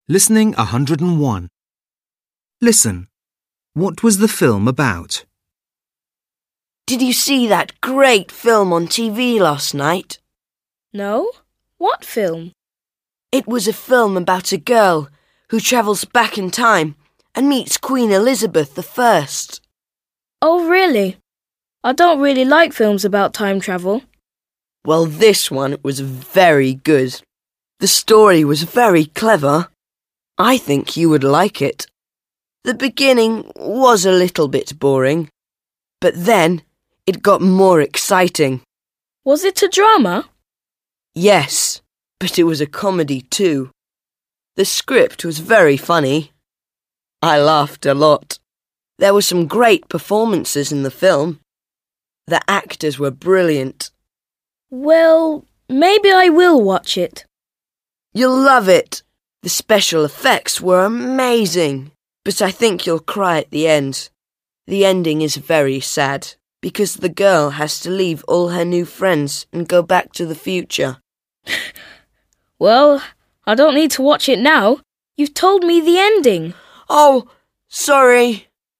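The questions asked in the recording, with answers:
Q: What was the film about?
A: A girl who travels back in time and meets Queen Elizabeth I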